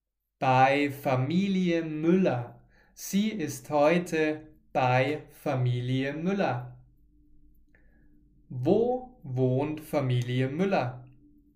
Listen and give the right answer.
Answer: In Berlin, in der Hauptstadt von Deutschland.